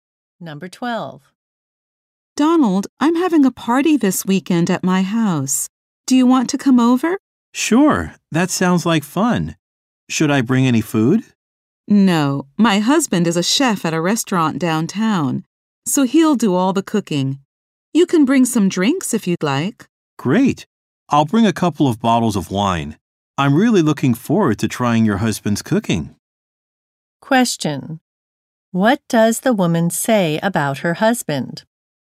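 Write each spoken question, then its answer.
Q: What does the woman say about her husband?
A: He is a chef and will do all the cooking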